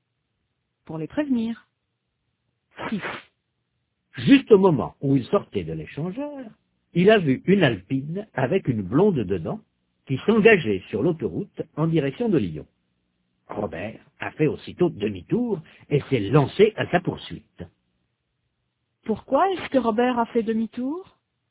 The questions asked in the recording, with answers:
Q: Pourquoi est-ce que Robert a fait demi-tour?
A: Pour se lancer à la poursuite de l'Alpine.